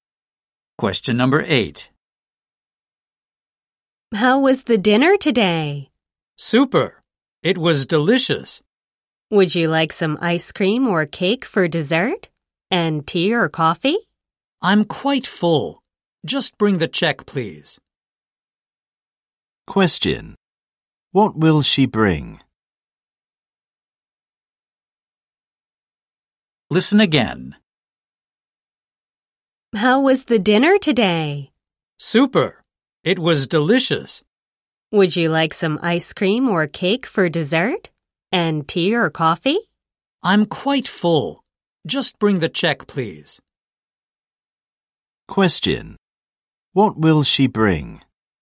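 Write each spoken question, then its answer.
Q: What will she bring?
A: The check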